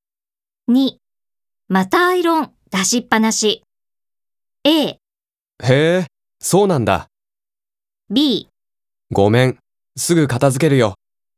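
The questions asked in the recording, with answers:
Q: またアイロン出しっぱなし。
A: B: ごめん、すぐ片付けるよ。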